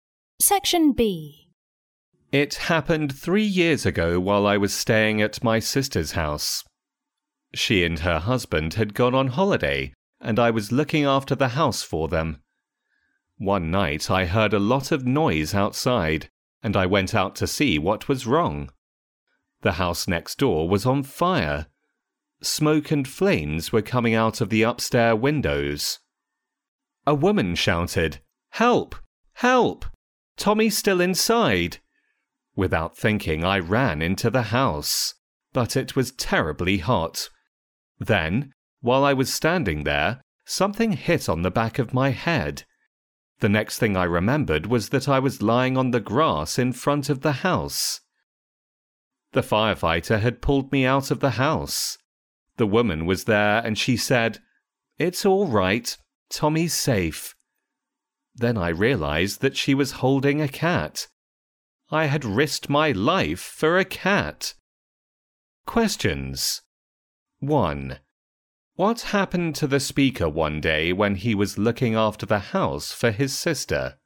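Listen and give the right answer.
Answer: The house next door caught fire; he ran in to save Tommy, was hit on the head and was pulled out by a firefighter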